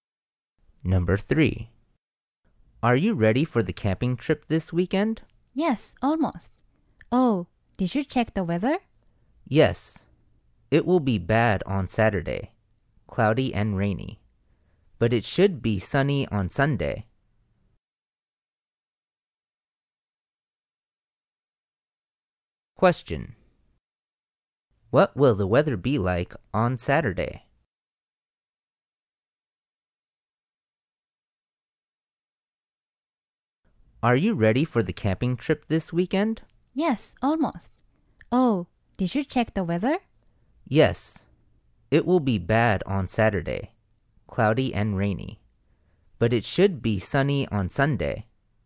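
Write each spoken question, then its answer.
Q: What will the weather be like on Saturday?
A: Cloudy and rainy.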